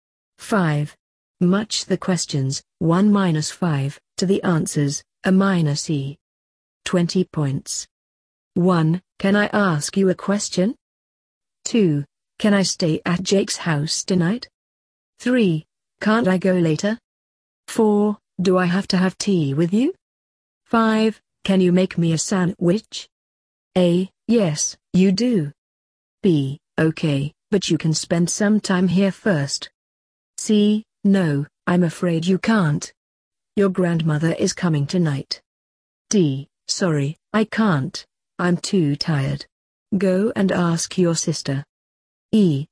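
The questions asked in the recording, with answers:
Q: Can I stay at Jake's house tonight?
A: C: No, I'm afraid you can't. Your grandmother is coming tonight.

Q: Can you make me a sandwich?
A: D: Sorry, I can't. I'm too tired. Go and ask your sister.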